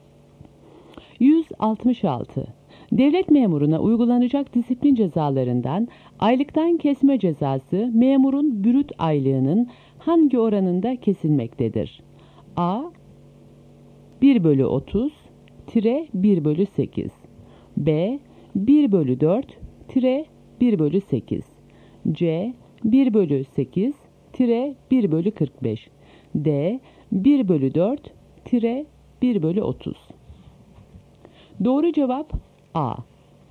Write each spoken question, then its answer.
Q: Devlet memuruna uygulanacak disiplin cezalarından aylıktan kesme cezası memurun brüt aylığının hangi oranında kesilmektedir?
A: Doğru cevap A.